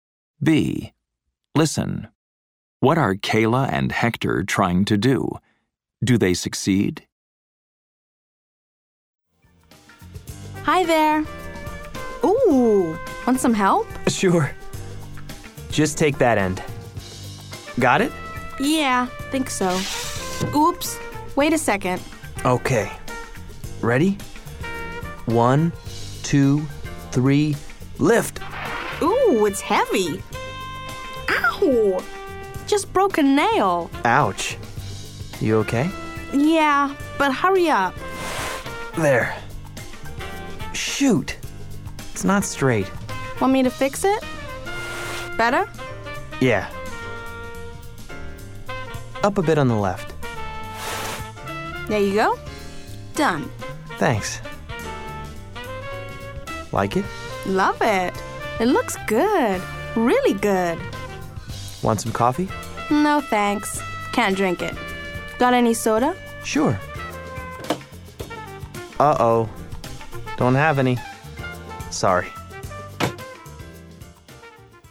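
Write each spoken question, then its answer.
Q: Do they succeed?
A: Yes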